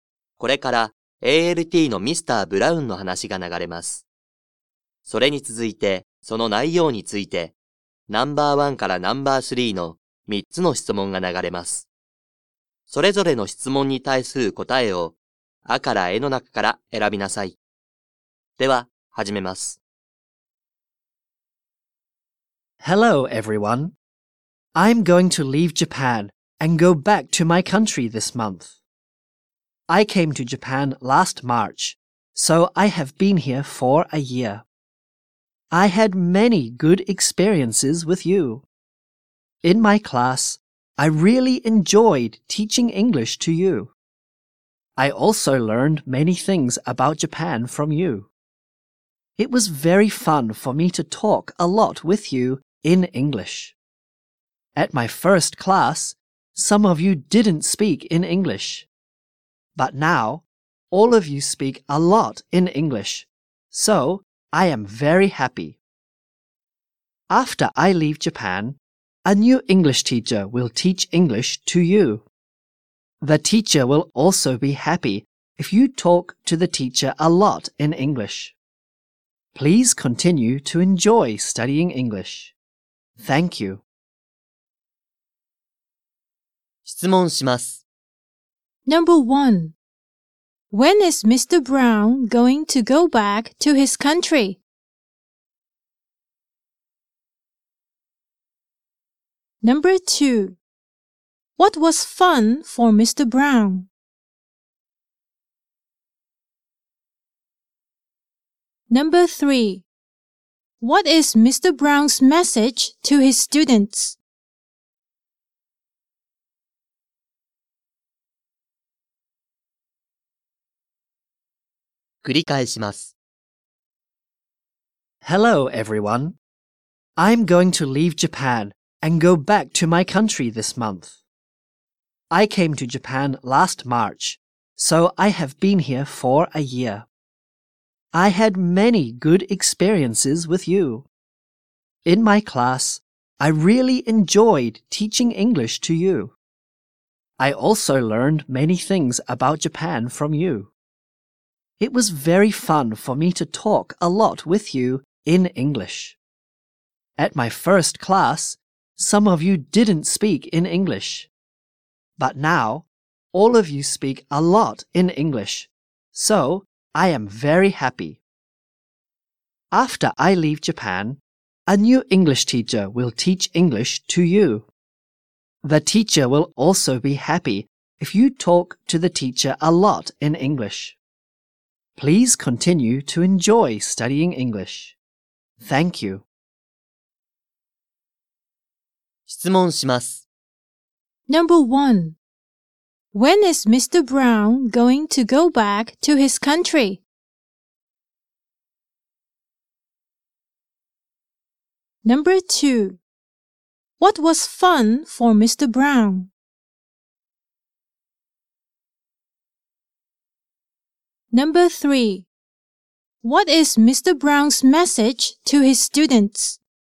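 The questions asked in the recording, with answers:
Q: When is Mr. Brown going to go back to his country?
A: This month

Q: What was fun for Mr.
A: Talking a lot with the students in English

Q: What is Mr. Brown's message to his students?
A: Please continue to enjoy studying English.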